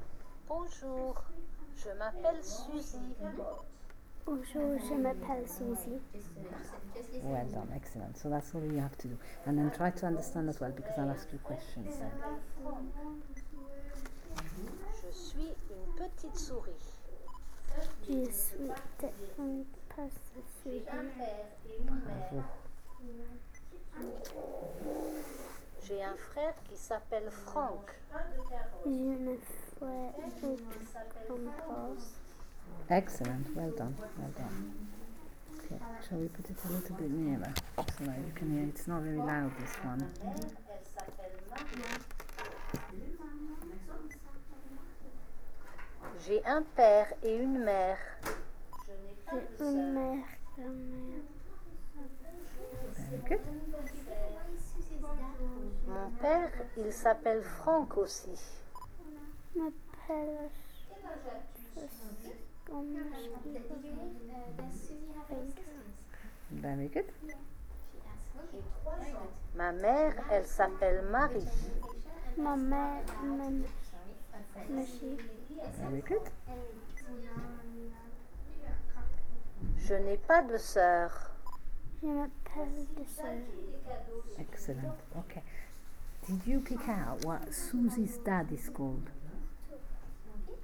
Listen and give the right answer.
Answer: mon père, il s'appelle Franck aussi.